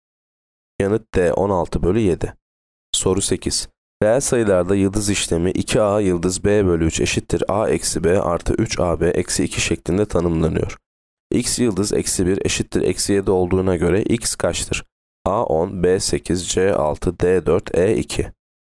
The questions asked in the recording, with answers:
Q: X yıldız eksi 1 eşittir eksi 7 olduğuna göre x kaçtır?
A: Yanıt E 2.